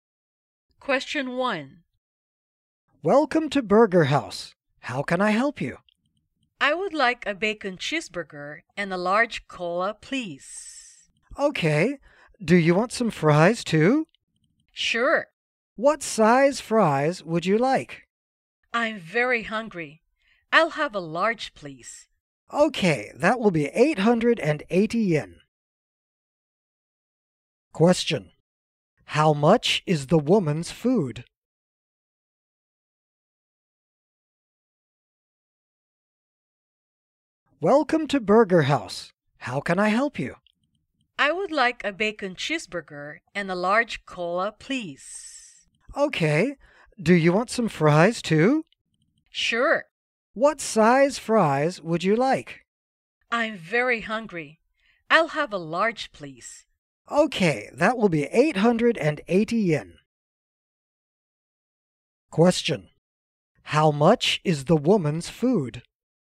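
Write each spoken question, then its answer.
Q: How much is the woman's food?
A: 880 yen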